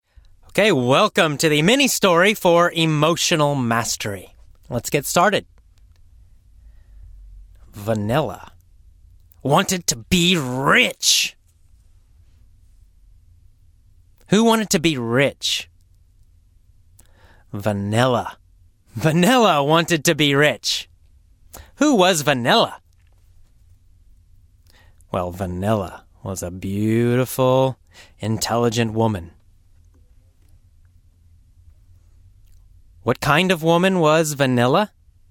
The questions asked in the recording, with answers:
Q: What kind of woman was Vanilla?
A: She was a beautiful, intelligent woman.